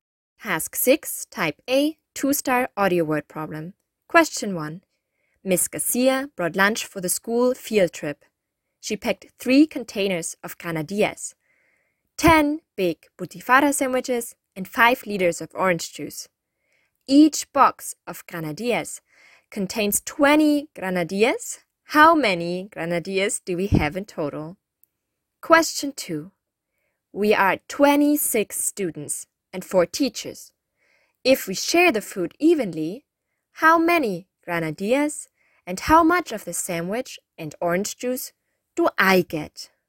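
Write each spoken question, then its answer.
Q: How many granadillas do we have in total?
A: 60 granadillas

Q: If we share the food evenly, how many granadillas and how much of the sandwich and orange juice do I get?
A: 2 granadillas, 1/3 of a sandwich and 1/6 liter of orange juice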